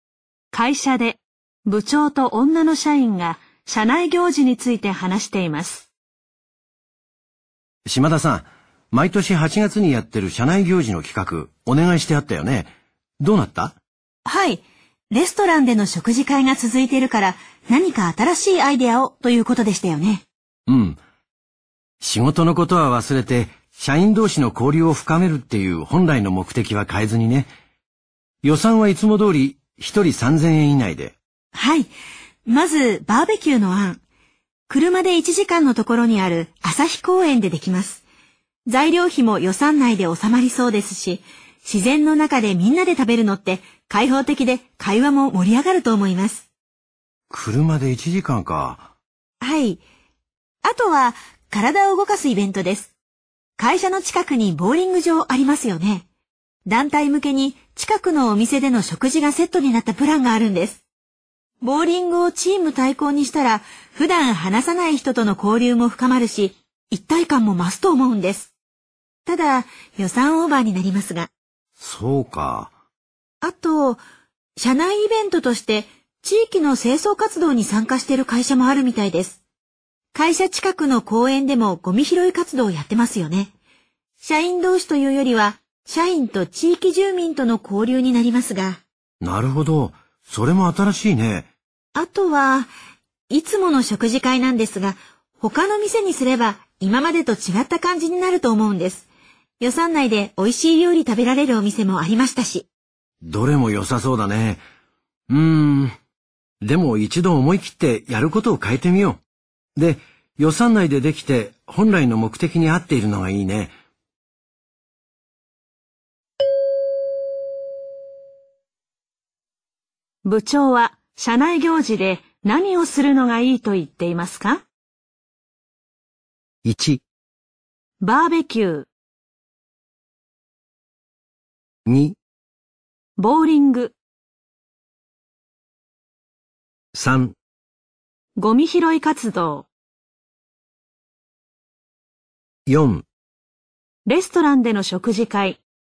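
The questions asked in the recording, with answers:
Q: 部長は社内行事で何をするのがいいと言っていますか?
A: 1: バーベキュー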